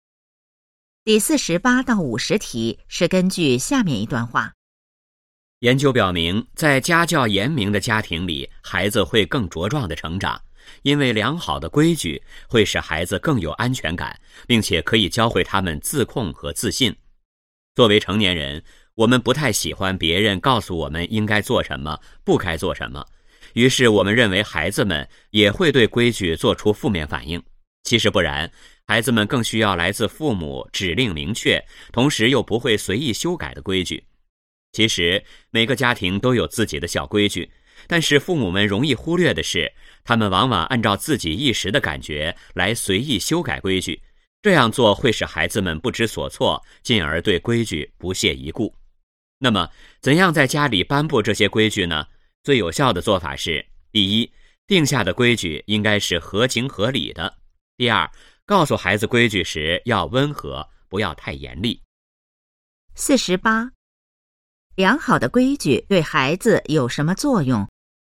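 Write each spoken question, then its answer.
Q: 良好的规矩对孩子有什么作用?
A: 使孩子更有安全感,教会他们自控和自信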